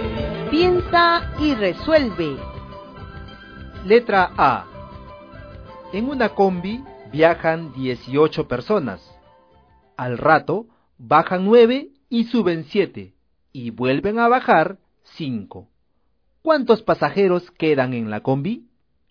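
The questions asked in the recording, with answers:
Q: ¿Cuántos pasajeros quedan en la combi?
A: 11 pasajeros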